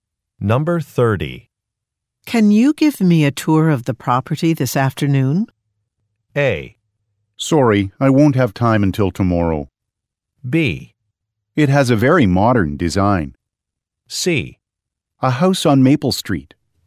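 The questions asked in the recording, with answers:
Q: Can you give me a tour of the property this afternoon?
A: A: Sorry, I won't have time until tomorrow.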